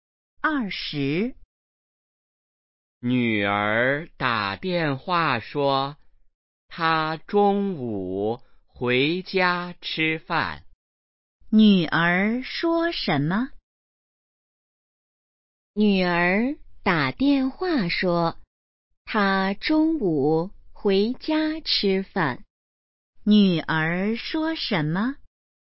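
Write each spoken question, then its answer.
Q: 女儿说什么?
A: 她中午回家吃饭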